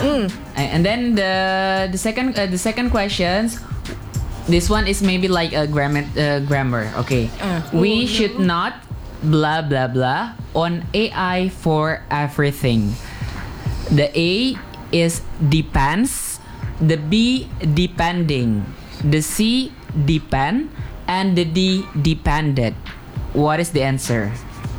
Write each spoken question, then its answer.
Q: We should not blah blah blah on AI for everything.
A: Yeah, okay, the answer is C.